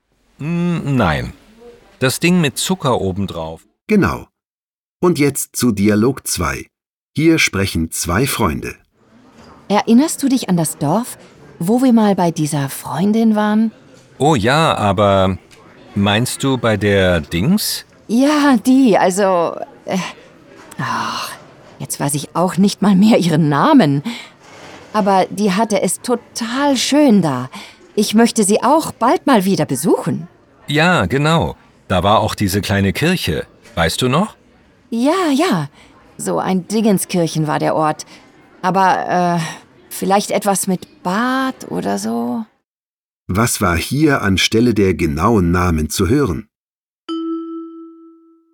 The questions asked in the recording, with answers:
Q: Was war hier anstelle der genauen Namen zu hören?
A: Oh ja, aber meinst du bei der Dings? Ja, die. So ein Dingenskirchen war der Ort.